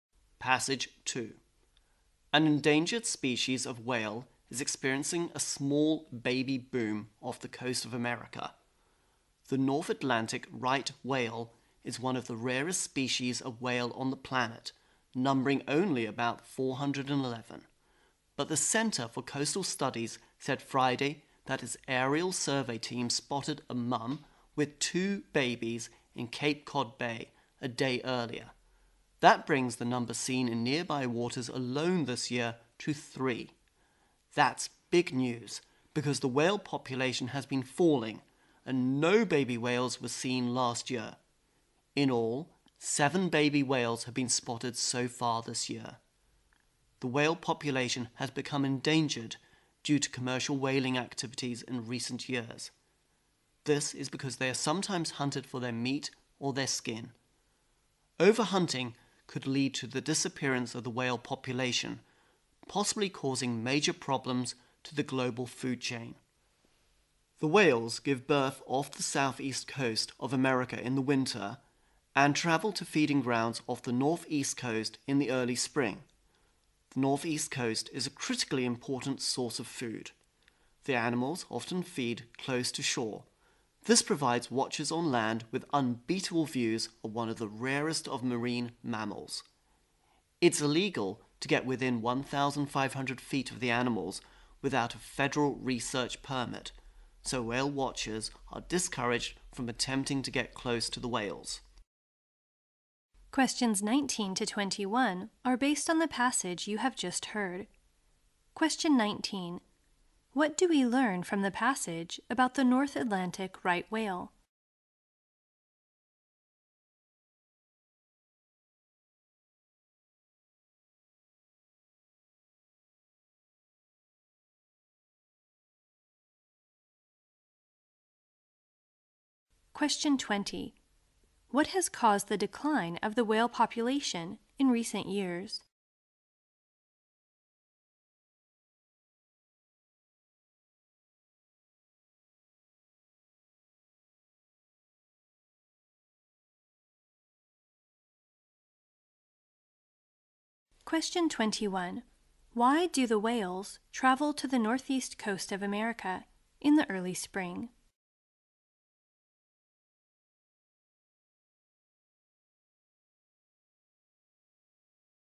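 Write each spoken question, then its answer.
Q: What do we learn from the passage about the North Atlantic right whale?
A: It is one of the rarest whale species, numbering about 411

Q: What has caused the decline of the whale population in recent years?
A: Commercial whaling

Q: Why do the whales travel to the northeast coast of America in the early spring?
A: To feed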